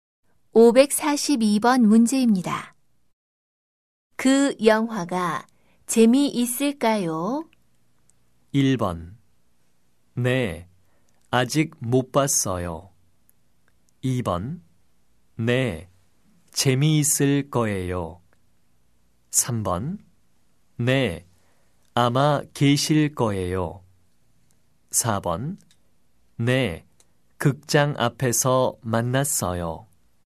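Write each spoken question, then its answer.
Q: 그 영화가 재미있을까요?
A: 2: 네, 재미있을 거예요.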